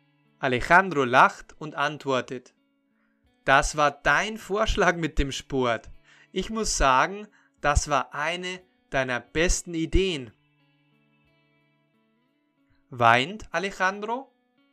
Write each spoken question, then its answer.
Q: Weint Alejandro?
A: Nein, Alejandro weint nicht.